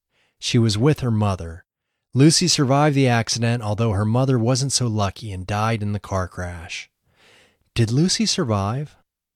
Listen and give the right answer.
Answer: Yes, luckily Lucy survived.